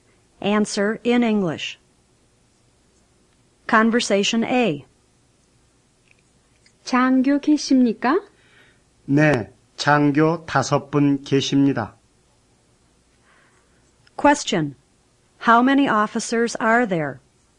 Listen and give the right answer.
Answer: 5 officers.